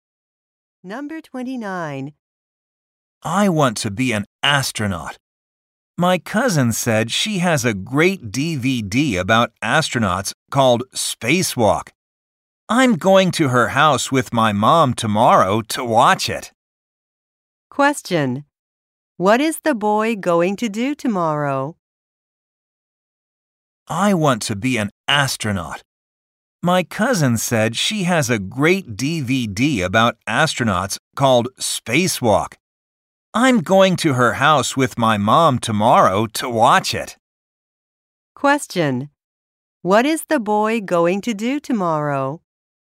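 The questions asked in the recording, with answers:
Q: What is the boy going to do tomorrow?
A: Go to his cousin's house to watch a DVD.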